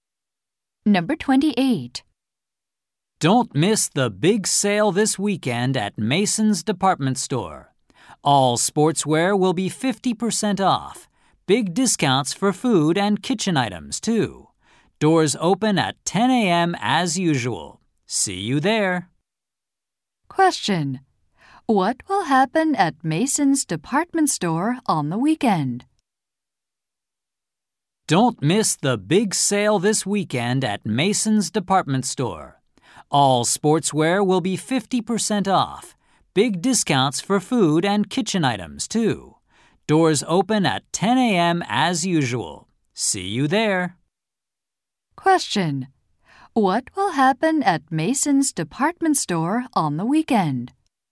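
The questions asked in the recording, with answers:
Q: What will happen at Mason's Department Store on the weekend?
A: There will be a big sale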